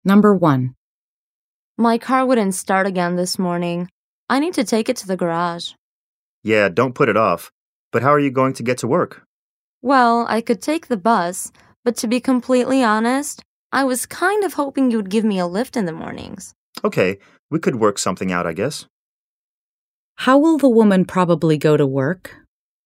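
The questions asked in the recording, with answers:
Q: How will the woman probably go to work?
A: The man will give her a lift (ride with him)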